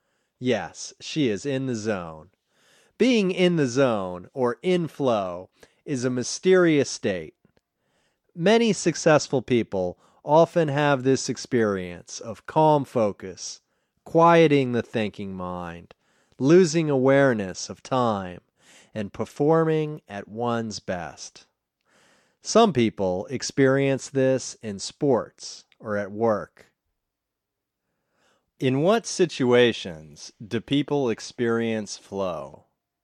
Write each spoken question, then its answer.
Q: In what situations do people experience flow?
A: Some people experience flow in sports or at work.